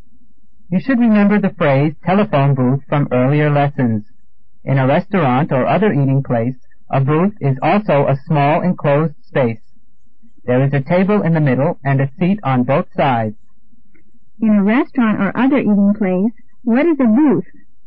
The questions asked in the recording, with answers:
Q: In a restaurant or other eating place, what is a booth?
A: A small enclosed space.